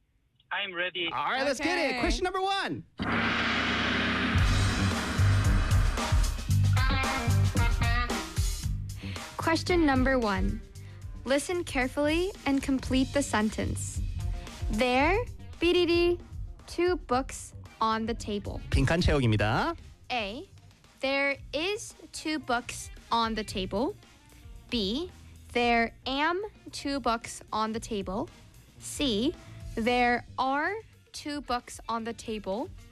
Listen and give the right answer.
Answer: 네, 정답은 C입니다.